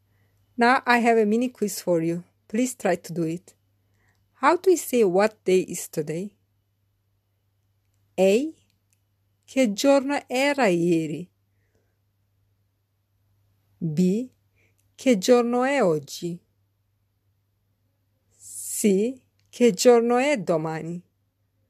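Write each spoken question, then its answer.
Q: How do we say what day is today?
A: B: Che giorno è oggi?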